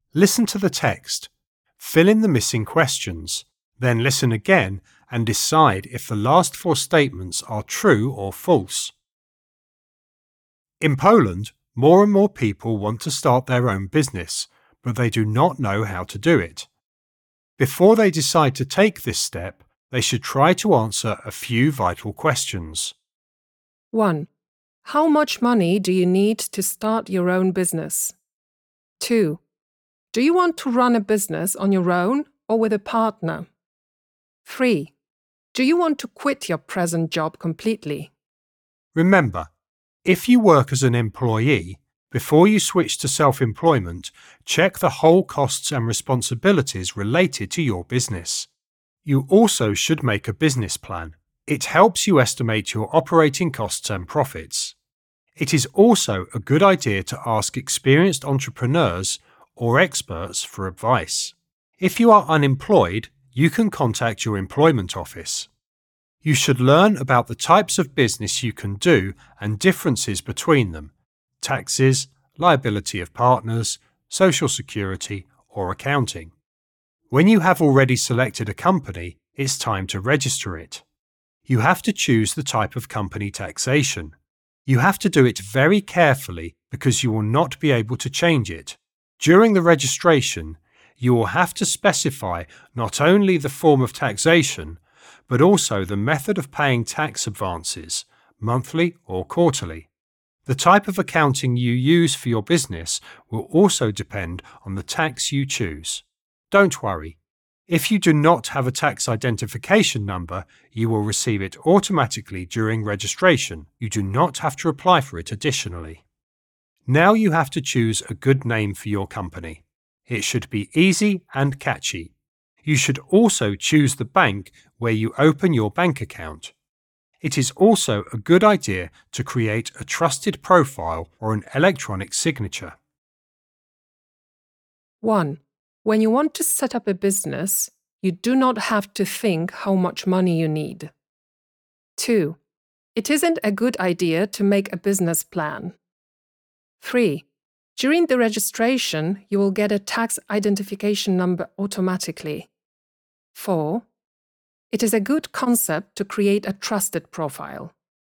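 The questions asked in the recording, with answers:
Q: When you want to set up a business, you do not have to think how much money you need.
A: False

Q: It isn't a good idea to make a business plan.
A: False

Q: During the registration, you will get a tax identification number automatically.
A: True

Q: It is a good concept to create a trusted profile.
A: True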